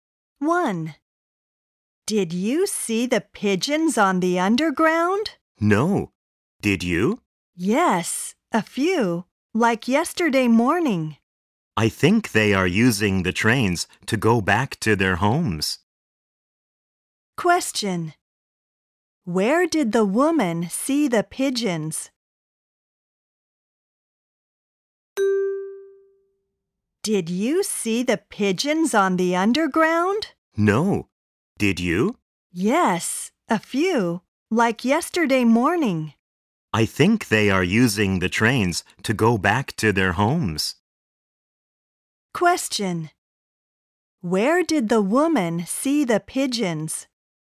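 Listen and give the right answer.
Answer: On the underground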